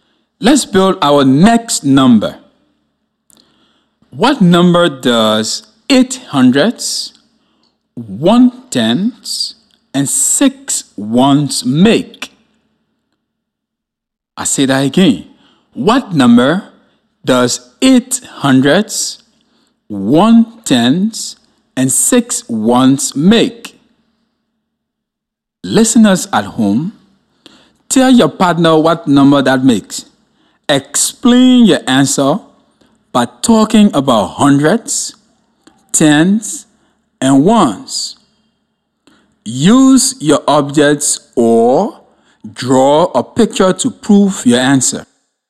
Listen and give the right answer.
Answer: I got 816.